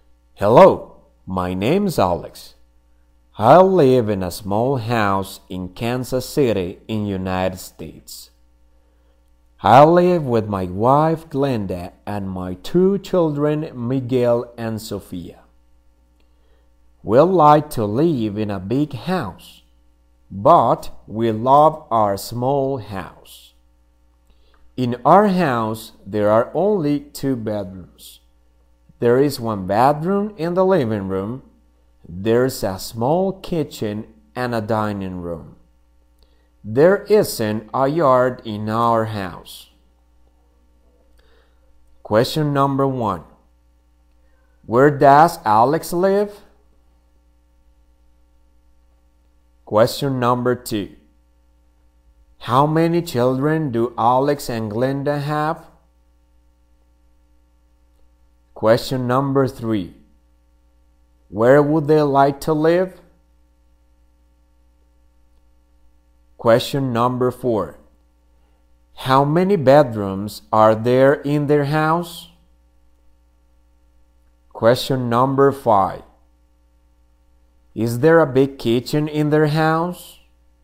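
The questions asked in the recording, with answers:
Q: Where does Alex live?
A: In a small house in Kansas City, United States

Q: How many children do Alex and Glenda have?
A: Two

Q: Where would they like to live?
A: In a big house

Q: How many bedrooms are there in their house?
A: Two

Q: Is there a big kitchen in their house?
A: No, there's a small kitchen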